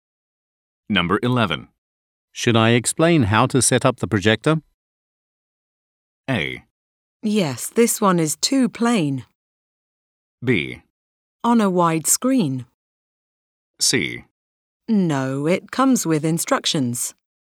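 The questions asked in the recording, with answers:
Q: Should I explain how to set up the projector?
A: C: No, it comes with instructions.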